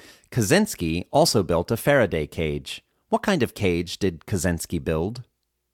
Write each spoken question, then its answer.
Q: What kind of cage did Kaczynski build?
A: Kaczynski built a Faraday cage.